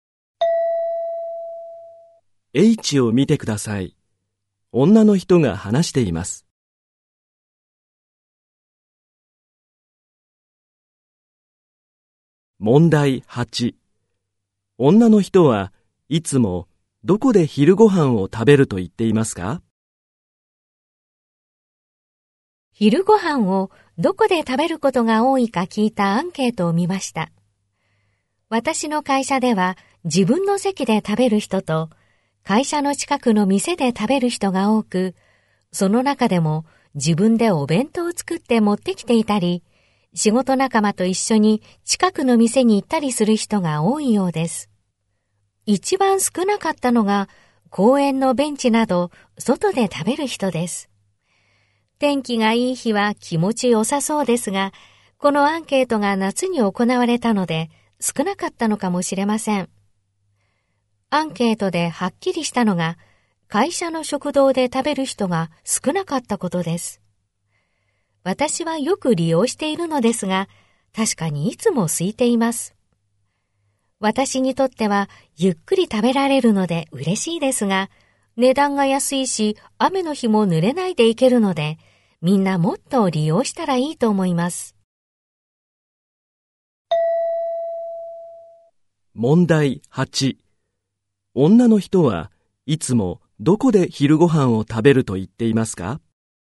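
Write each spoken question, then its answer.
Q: 女の人はいつもどこで昼ご飯を食べると言っていますか?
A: 会社の食堂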